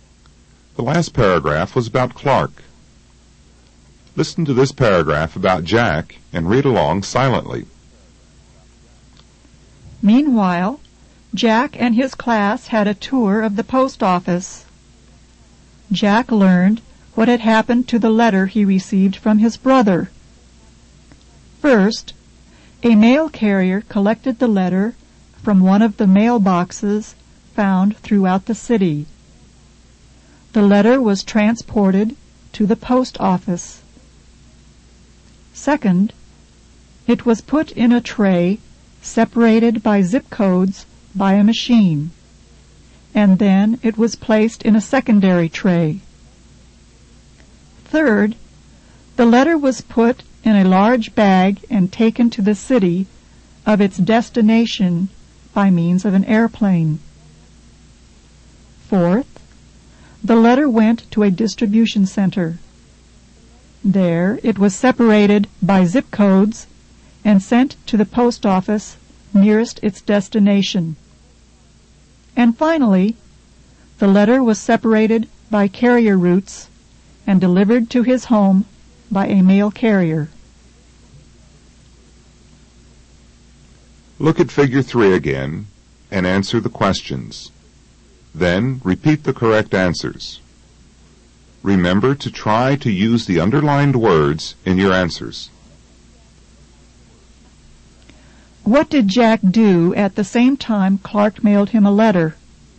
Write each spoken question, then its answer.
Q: What did Jack do at the same time Clark mailed him a letter?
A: Meanwhile, his class had a tour to the post office.